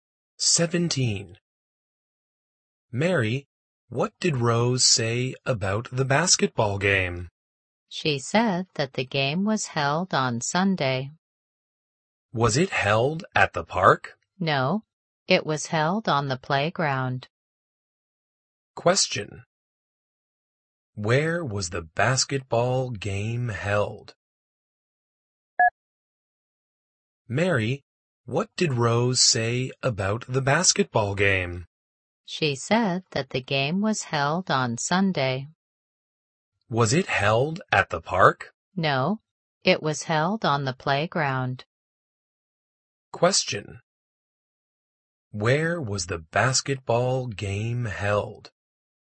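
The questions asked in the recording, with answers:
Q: Where was the basketball game held?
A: On the playground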